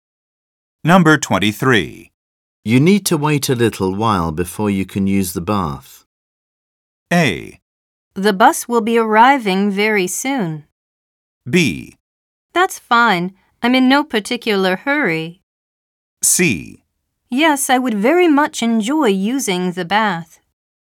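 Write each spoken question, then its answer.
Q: You need to wait a little while before you can use the bath.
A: B: That's fine. I'm in no particular hurry.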